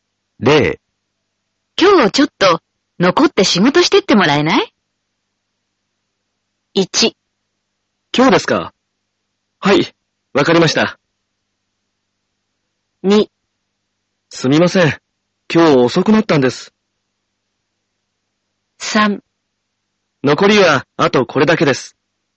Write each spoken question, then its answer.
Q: で、今日ちょっと残って仕事してってもらえな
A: 最も